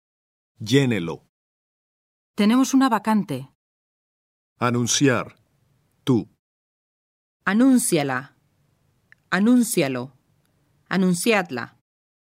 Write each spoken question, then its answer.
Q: Tenemos una vacante.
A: Anúnciala.